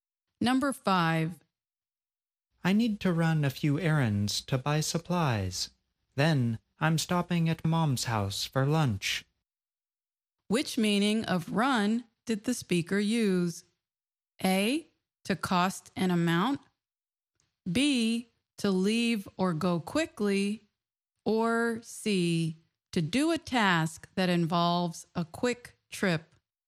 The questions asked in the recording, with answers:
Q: Which meaning of run did the speaker use?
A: The answer is C, to do a task that involves a quick trip.